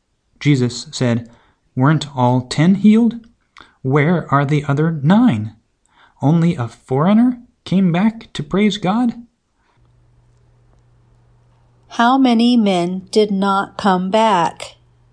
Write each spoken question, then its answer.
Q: How many men did not come back?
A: 9 men did not come back.